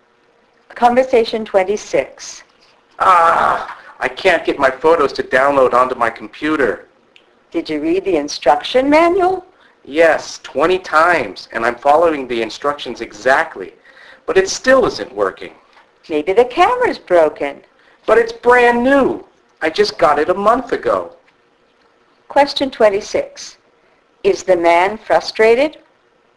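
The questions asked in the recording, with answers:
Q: Is the man frustrated?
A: Yes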